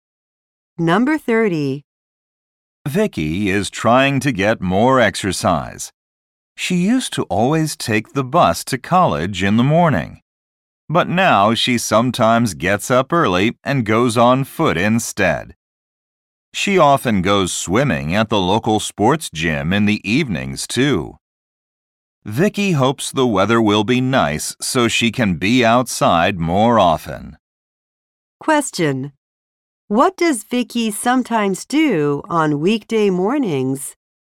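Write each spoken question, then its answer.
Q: What does Vicky sometimes do on weekday mornings?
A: Walks to college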